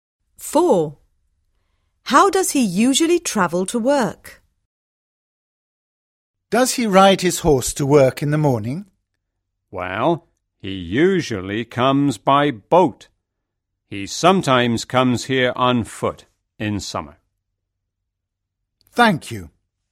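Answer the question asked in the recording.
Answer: By boat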